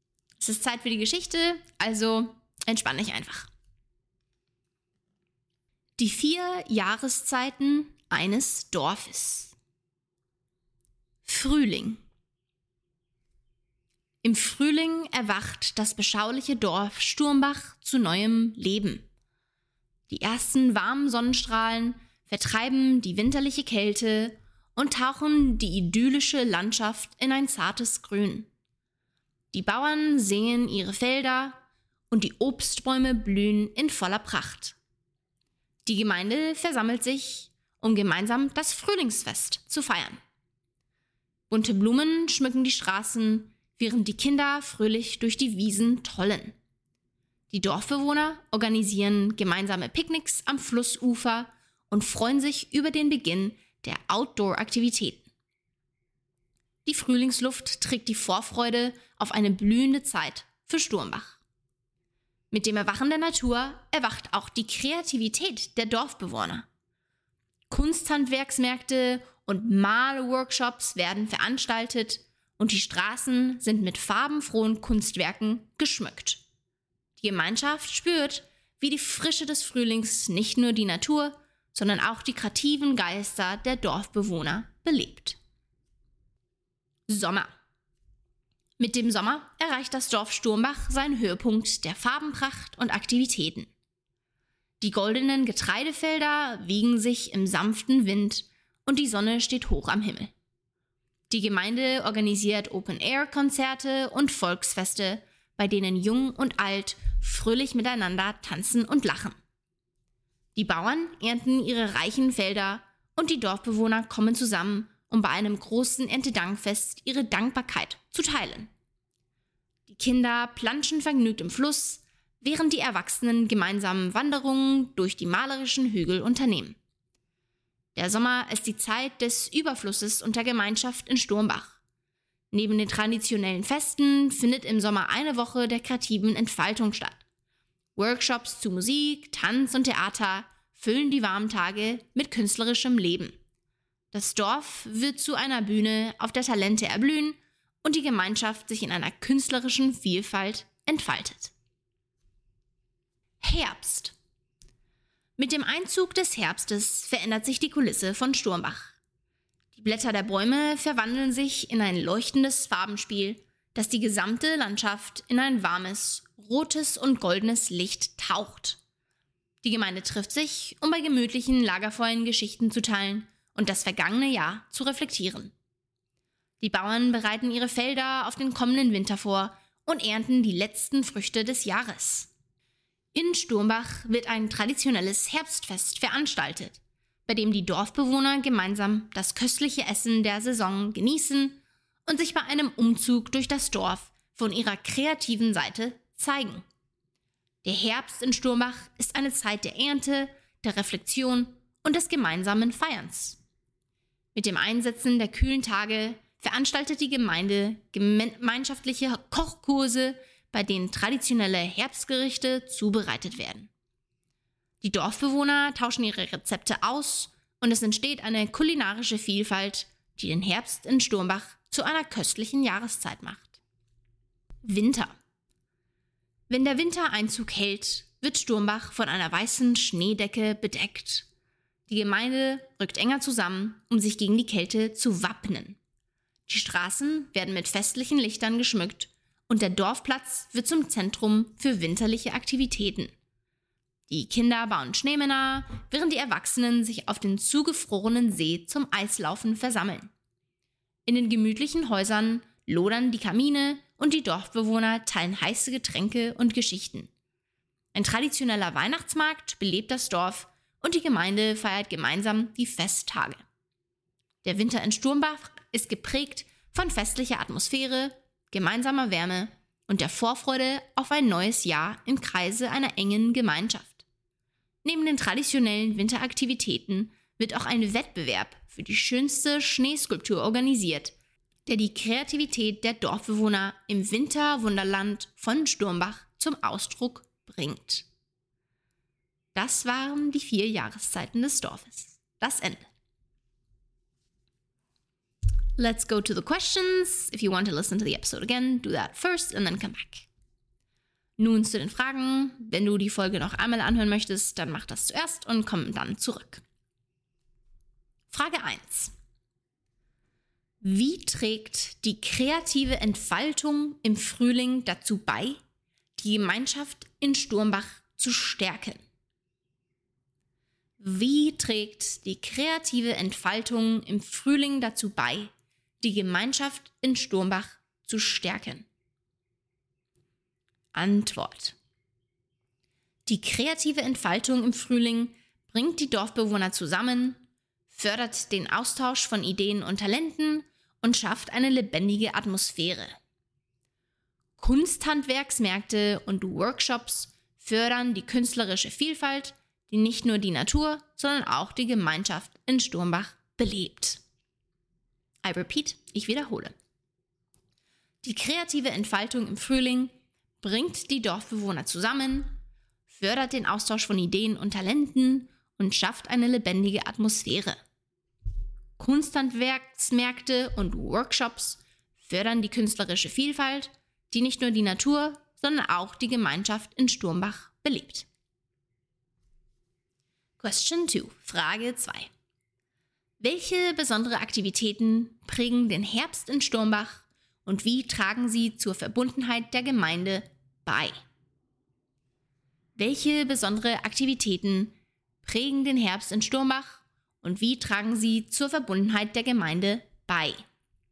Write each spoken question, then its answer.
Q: Wie trägt die kreative Entfaltung im Frühling dazu bei, die Gemeinschaft in Sturmbach zu stärken?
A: Die kreative Entfaltung im Frühling bringt die Dorfbewohner zusammen, fördert den Austausch von Ideen und Talenten und schafft eine lebendige Atmosphäre.

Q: Welche besondere Aktivitäten prägen den Herbst in Sturmbach und wie tragen sie zur Verbundenheit der Gemeinde bei?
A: Im Herbst organisiert die Gemeinde traditionelle Herbstfeste und kreative Kochkurse, bei denen die Dorfbewohner ihre kulinarischen Fähigkeiten teilen.